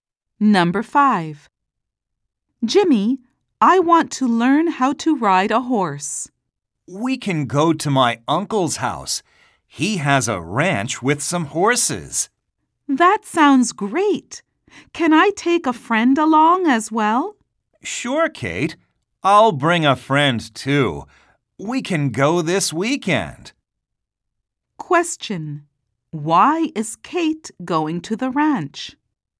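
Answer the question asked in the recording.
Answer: To learn how to ride a horse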